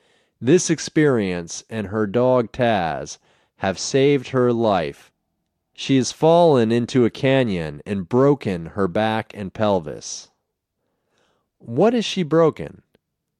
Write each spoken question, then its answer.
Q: What is she broken?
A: She has broken her back and pelvis.